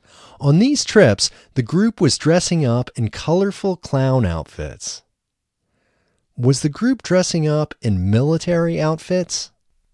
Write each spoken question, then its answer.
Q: Was the group dressing up in military outfits?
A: No, the group wasn't dressing up in military outfits.